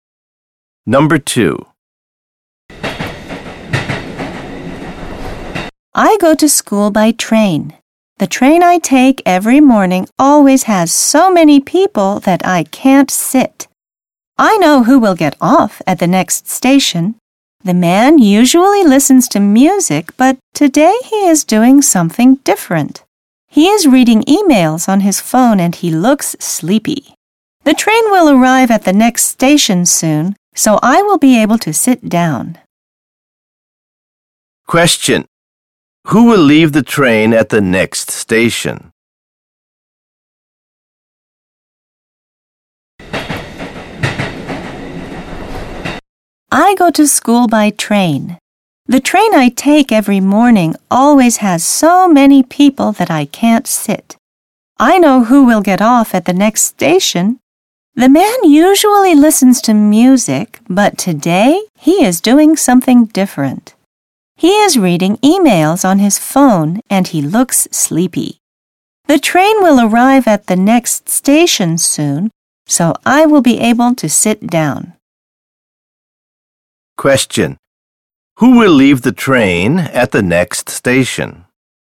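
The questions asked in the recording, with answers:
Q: Who will leave the train at the next station?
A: The man reading emails on his phone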